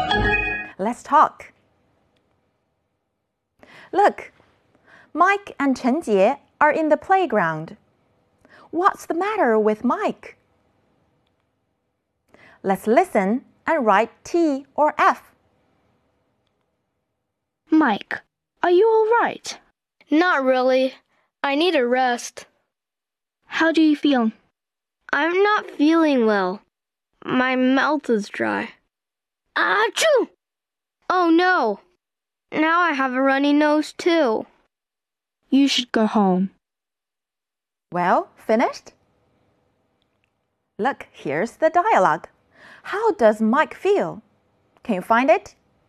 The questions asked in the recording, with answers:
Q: How does Mike feel? Can you find it?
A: I'm not feeling well. My mouth is dry.